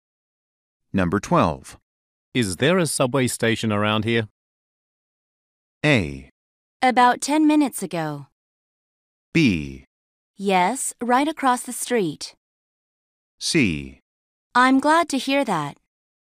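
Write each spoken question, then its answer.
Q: Is there a subway station around here?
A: B: Yes, right across the street.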